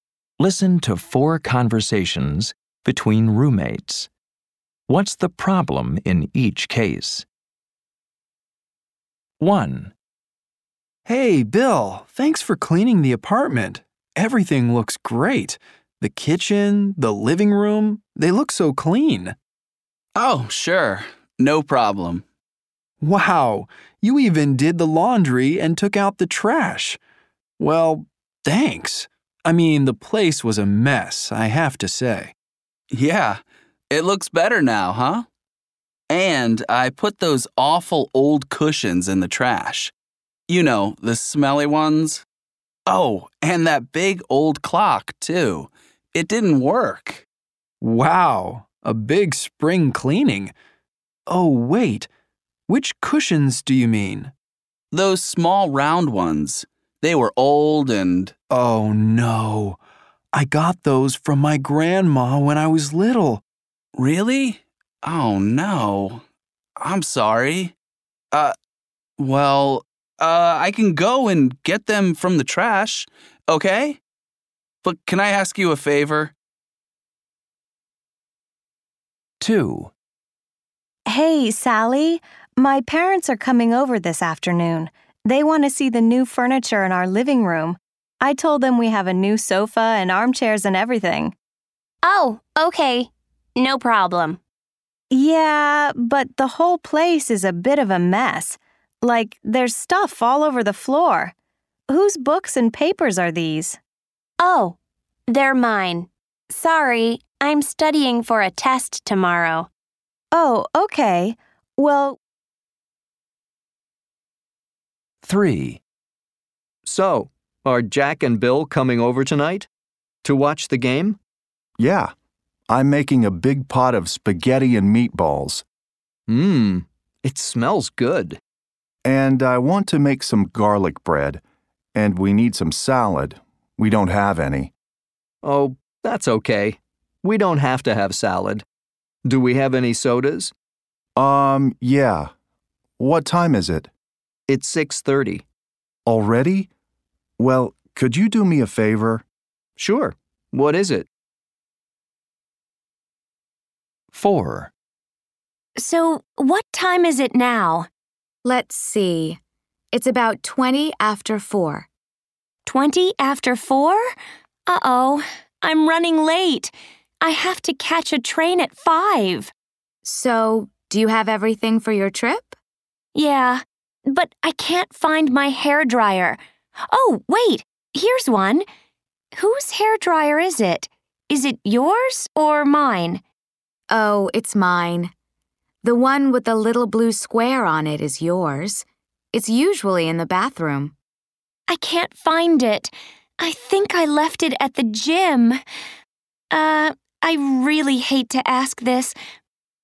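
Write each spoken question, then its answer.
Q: What's the problem in each case?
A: Bill threw away the cushions his roommate got from his grandma as a child.

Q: What's the problem in each case?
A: Her parents are coming, but Sally's books and papers are all over the floor.

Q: What's the problem in each case?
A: She is late for her train and can't find her hairdryer. She thinks she left it at the gym.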